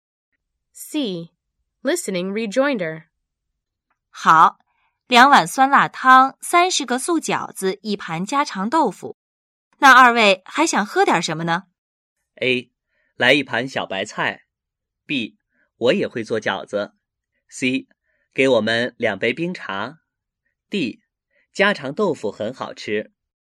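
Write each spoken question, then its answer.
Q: 那二位还想喝点什么呢?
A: C: 给我们两杯冰茶。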